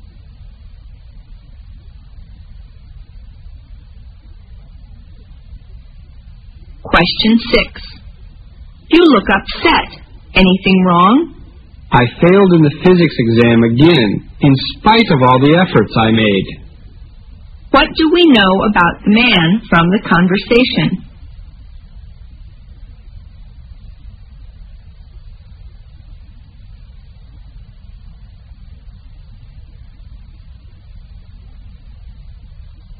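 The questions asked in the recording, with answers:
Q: What do we know about the man from the conversation?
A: He failed the physics exam again despite his efforts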